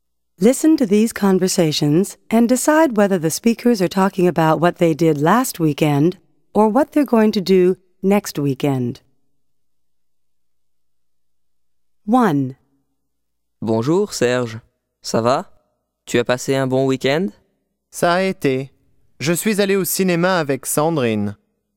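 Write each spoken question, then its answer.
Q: Listen to these conversations and decide whether the speakers are talking about what they did last weekend or what they're going to do next weekend.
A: last weekend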